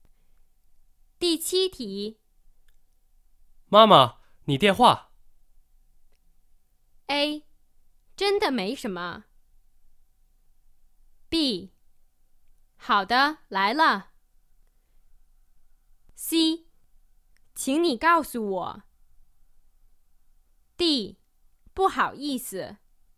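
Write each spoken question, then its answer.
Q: 妈妈,你电话。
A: B: 好的,来了。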